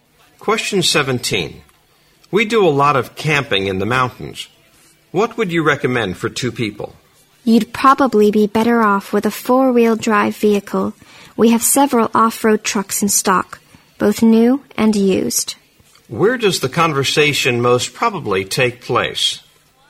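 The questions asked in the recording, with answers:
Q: Where does the conversation most probably take place?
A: At a car (vehicle) dealership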